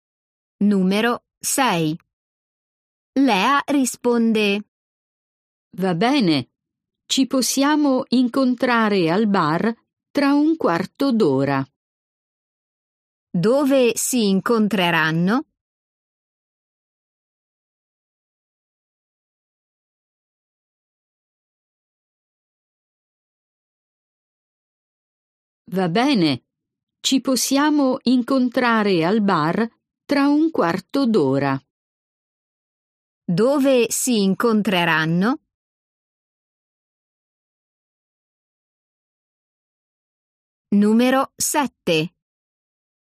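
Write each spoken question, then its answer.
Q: Dove si incontreranno?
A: al bar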